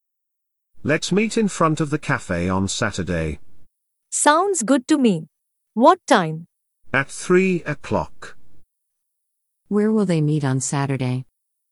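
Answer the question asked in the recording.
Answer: In front of the cafe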